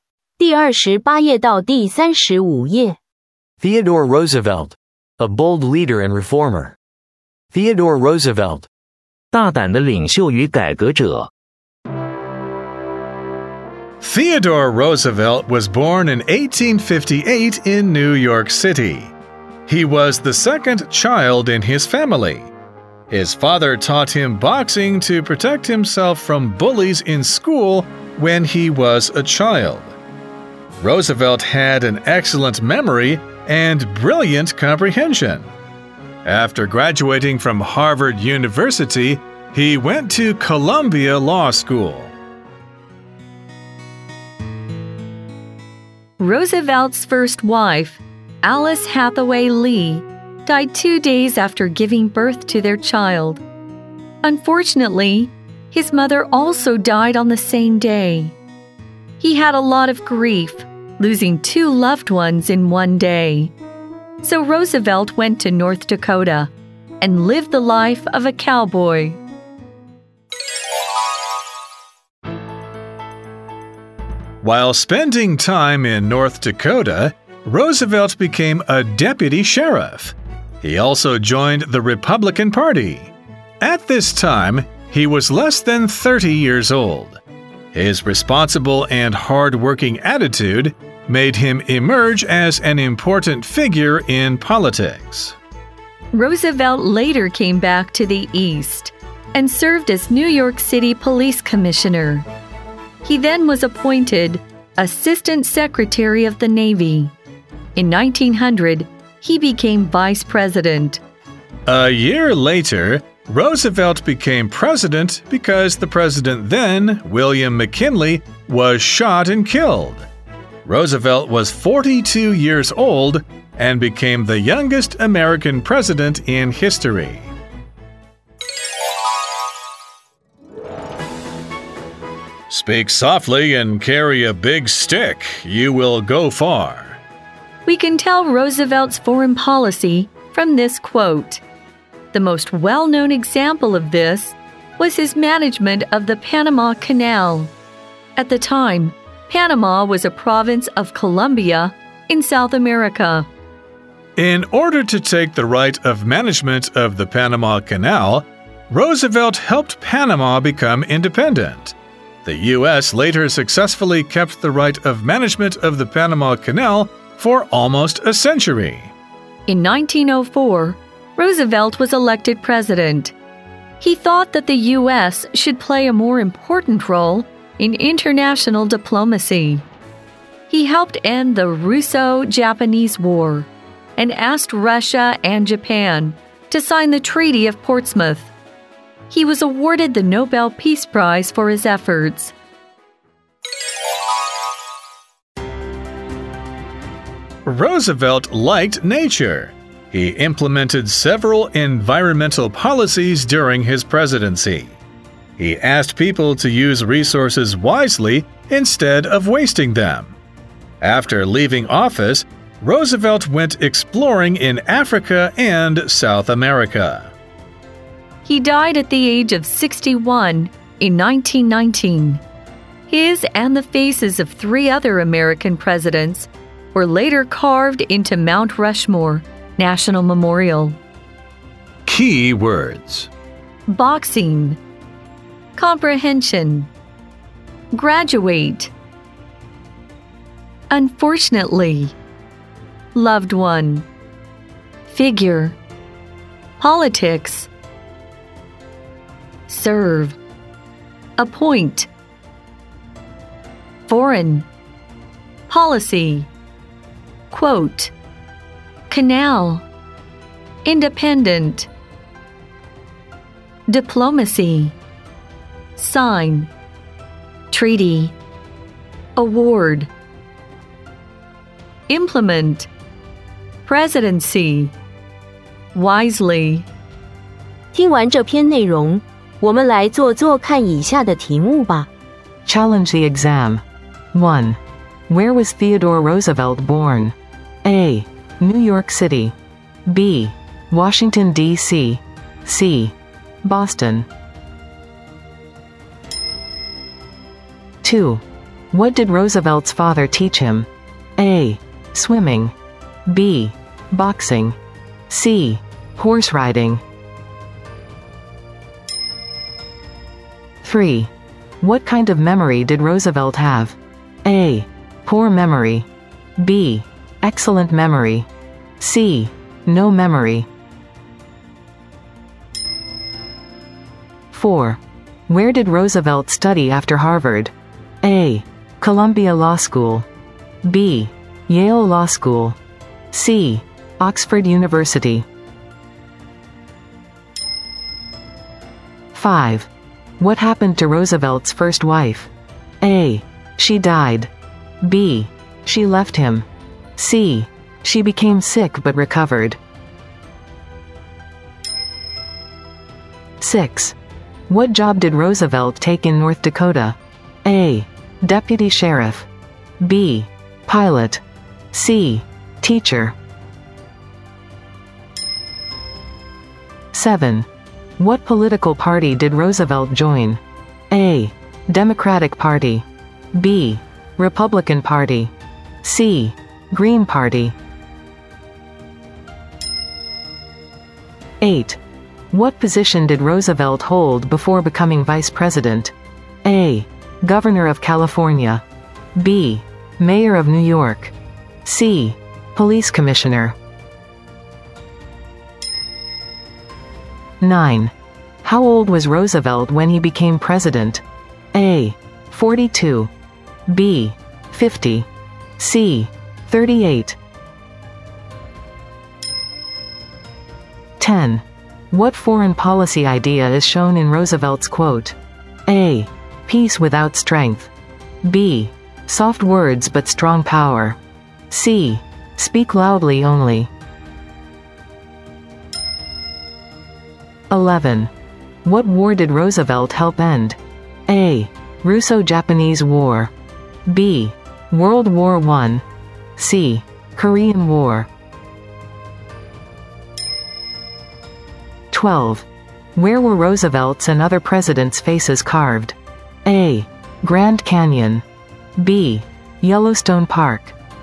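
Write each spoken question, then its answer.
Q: Where was Theodore Roosevelt born?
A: A: New York City.

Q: What did Roosevelt's father teach him?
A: B: Boxing.

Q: What kind of memory did Roosevelt have?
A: B: Excellent memory.

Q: Where did Roosevelt study after Harvard?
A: A: Columbia Law School.

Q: What happened to Roosevelt's first wife?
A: A: She died.

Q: What job did Roosevelt take in North Dakota?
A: A: Deputy Sheriff.

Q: What political party did Roosevelt join?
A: B: Republican Party.

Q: What position did Roosevelt hold before becoming Vice President?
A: C: Police Commissioner.

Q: How old was Roosevelt when he became president?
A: A: 42.

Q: What foreign policy idea is shown in Roosevelt's quote?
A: B: Soft words but strong power.

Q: What war did Roosevelt help end?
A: A: Russo-Japanese War.

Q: Where were Roosevelt's and other presidents' faces carved?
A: C: Mount Rushmore.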